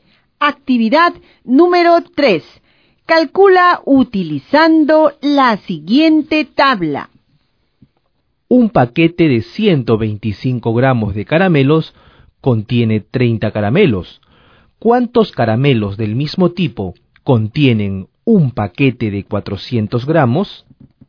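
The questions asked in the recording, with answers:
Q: ¿Cuántos caramelos del mismo tipo contienen un paquete de 400 gramos?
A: 96 caramelos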